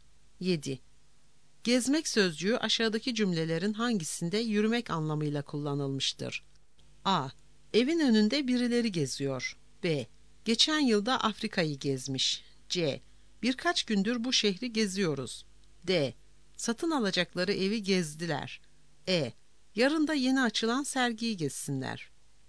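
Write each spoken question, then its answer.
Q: Gezmek sözcüğü aşağıdaki cümlelerin hangisinde yürümek anlamıyla kullanılmıştır?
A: A: Evin önünde birileri geziyor.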